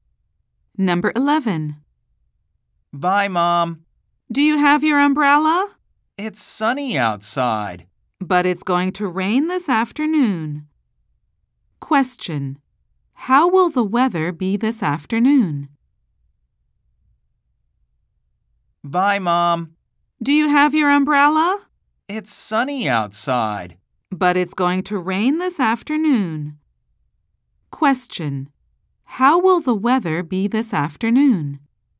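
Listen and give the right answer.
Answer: It will be rainy.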